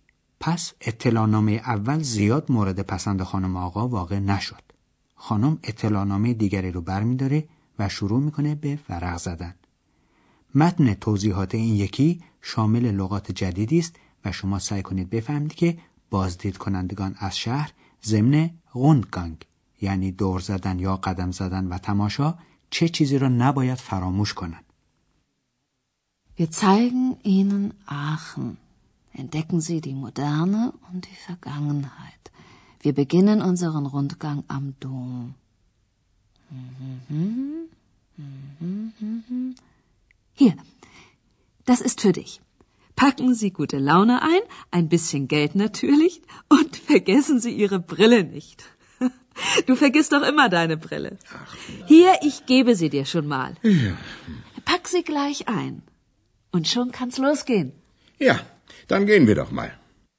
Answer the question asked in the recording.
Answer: پس با لحن تقریبا شوخیآمیز به بازدید کنندگان توصیه میشه که عینک خودشون رو فراموش نکنن.